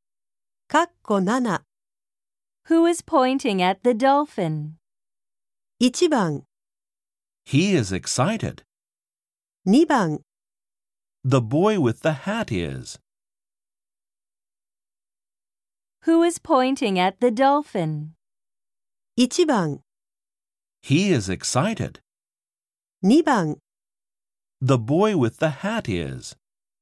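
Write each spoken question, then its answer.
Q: Who is pointing at the dolphin?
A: 2: The boy with the hat is.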